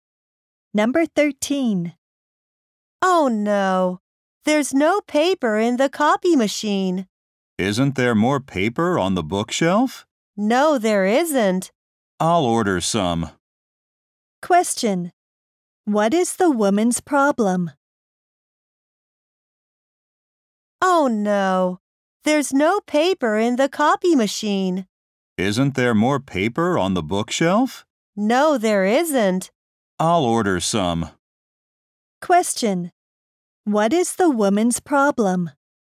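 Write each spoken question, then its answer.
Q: What is the woman's problem?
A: There's no paper in the copy machine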